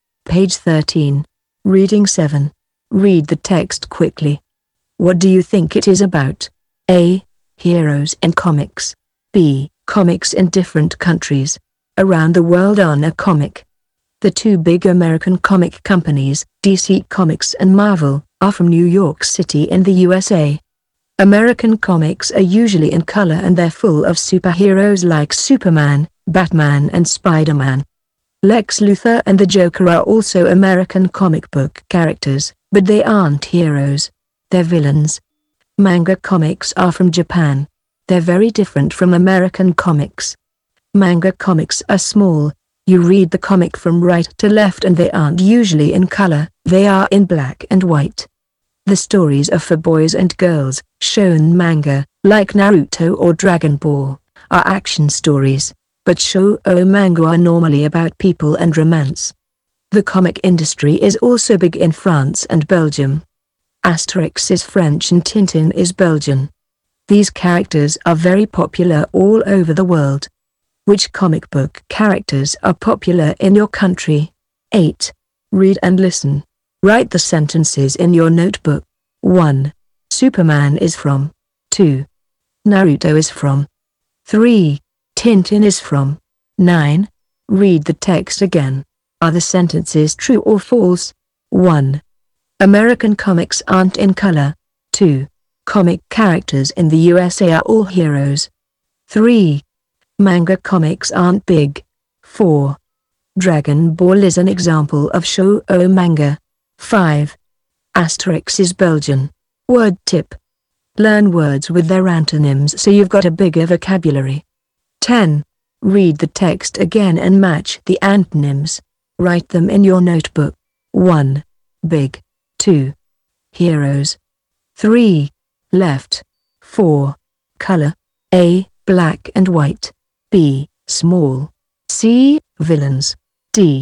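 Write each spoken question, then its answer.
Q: What do you think it is about?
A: B: Comics in different countries.

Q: Superman is from.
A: the USA

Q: Naruto is from.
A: Japan

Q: Tintin is from.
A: Belgium

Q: American comics aren't in color.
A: False

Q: Comic characters in the USA are all heroes.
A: False

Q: Manga comics aren't big.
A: True

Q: Dragon Ball is an example of shoujo manga.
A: False

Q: Asterix is Belgian.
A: False

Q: Heroes.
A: C: Villains.

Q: Left.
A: D: Right.

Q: Color.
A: A: Black and white.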